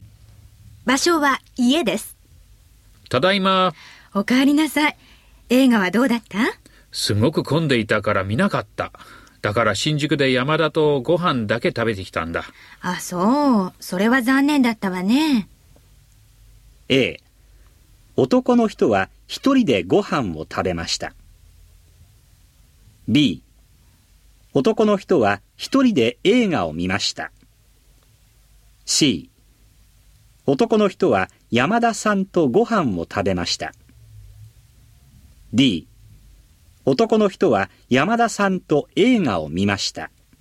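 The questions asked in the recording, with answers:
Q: A、 男の人は一人でご飯を食べました。 B、 男の人は一人で映画を見ました。 C、 男の人は山田さんとご飯を食べました。 D、 男の人は山田さんと映画を見ました。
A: C: 男の人は山田さんとご飯を食べました。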